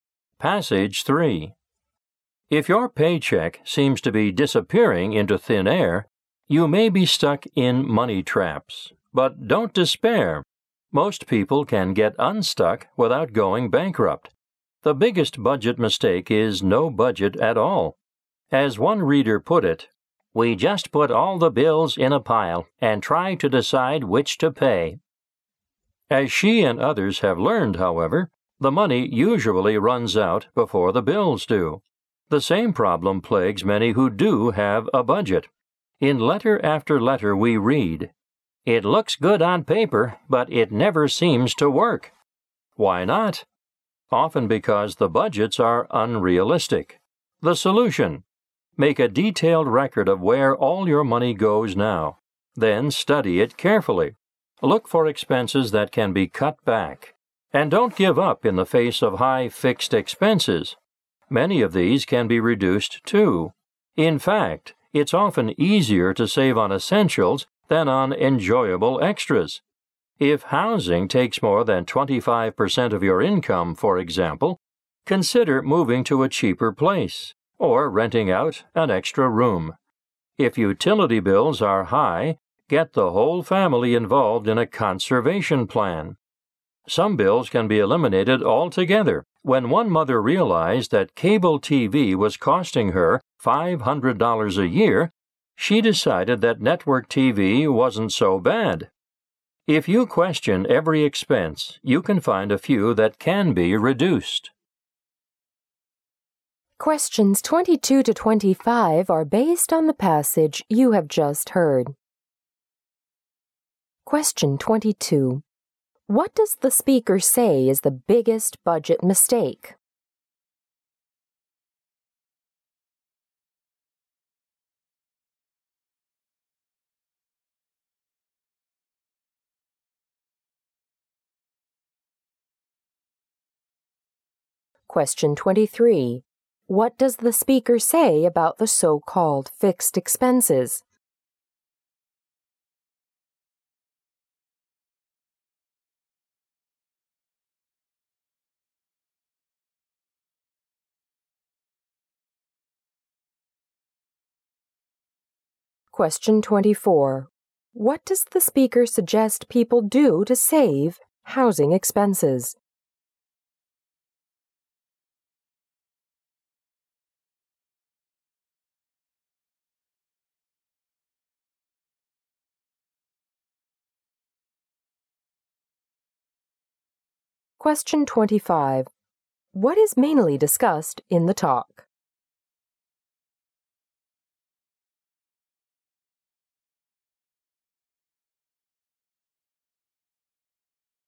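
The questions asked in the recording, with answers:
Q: What does the speaker say is the biggest budget mistake?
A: Having no budget at all.

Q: What does the speaker say about the so-called fixed expenses?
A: Many of them can be reduced too.

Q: What does the speaker suggest people do to save housing expenses?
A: Move to a cheaper place or rent out an extra room.

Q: What is mainly discussed in the talk?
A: How to get out of money traps by budgeting and cutting expenses.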